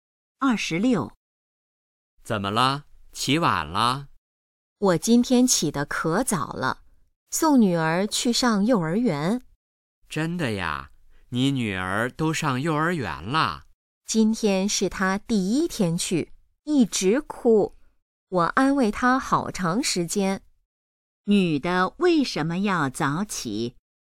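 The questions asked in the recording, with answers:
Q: 女的为什么要早起?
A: 送女儿去上幼儿园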